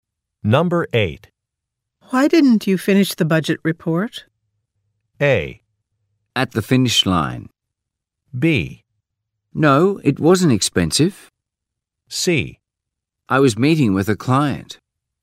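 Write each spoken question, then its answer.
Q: Why didn't you finish the budget report?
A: C: I was meeting with a client.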